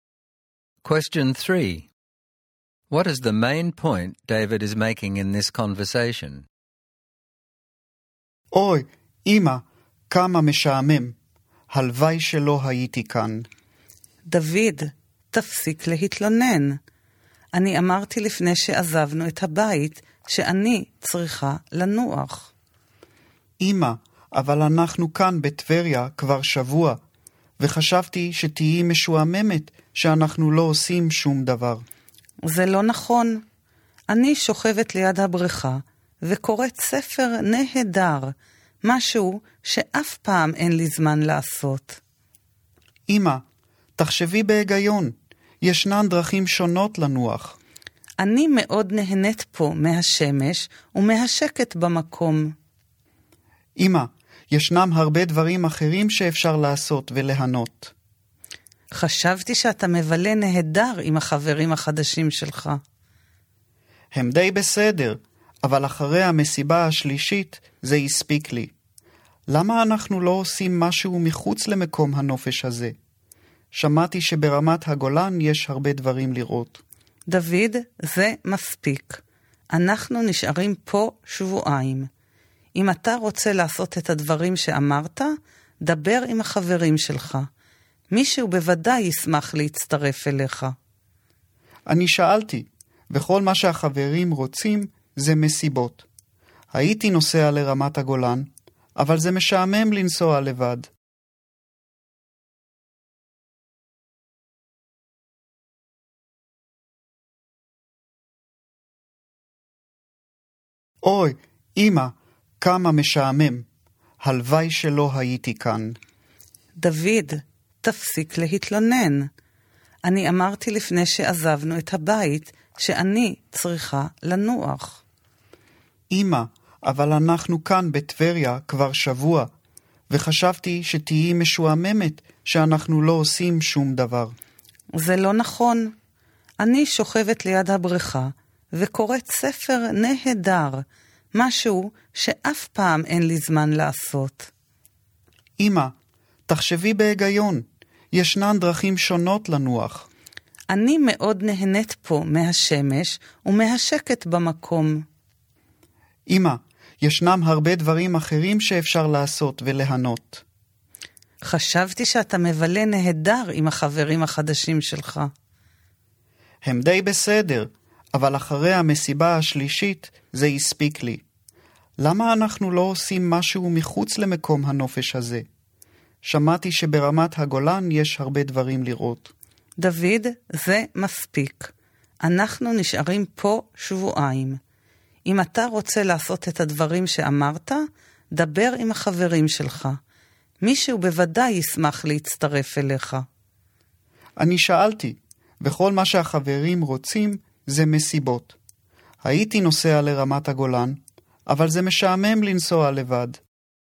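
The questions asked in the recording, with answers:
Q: What is the main point David is making in this conversation?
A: He is bored at the resort and wants his mother to go somewhere else with him, such as the Golan Heights, because he does not want to travel alone.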